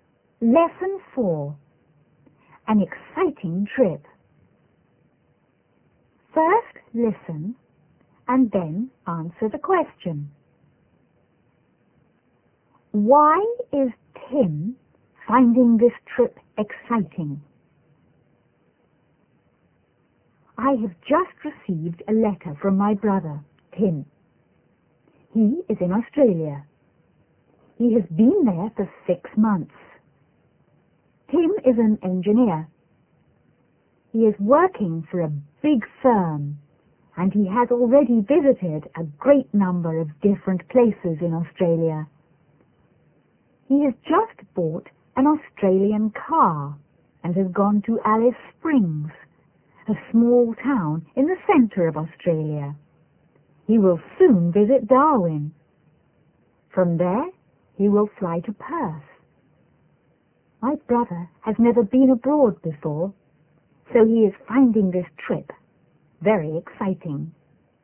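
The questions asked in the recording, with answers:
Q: Why is Tim finding this trip exciting?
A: Because he has never been abroad before.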